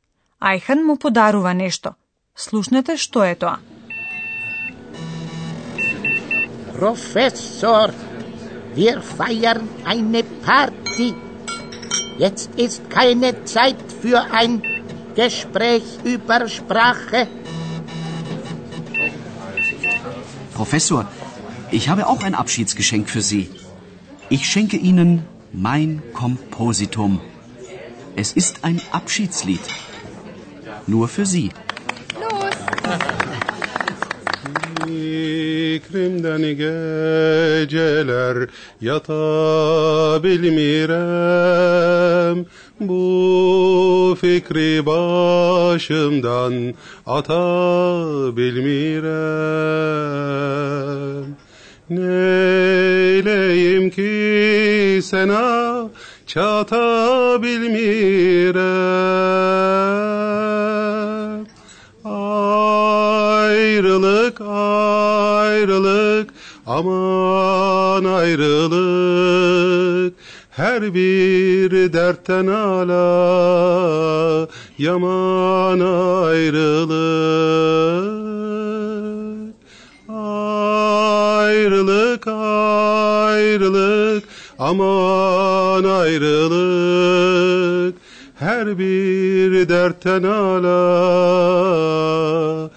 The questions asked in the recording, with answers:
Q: Ајхан му подарува нешто. Слушнете што е тоа.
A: Ајн апшицлит, песна за збогување.